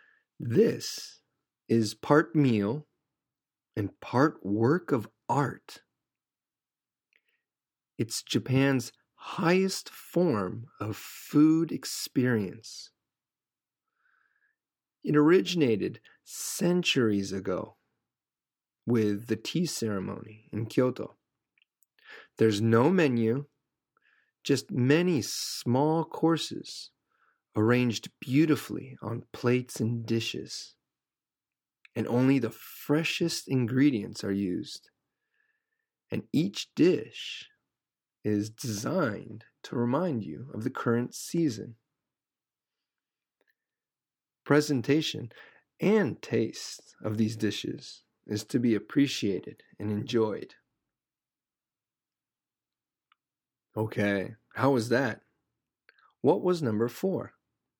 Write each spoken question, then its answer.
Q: What was number four?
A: The answer is 懐石. 懐石料理。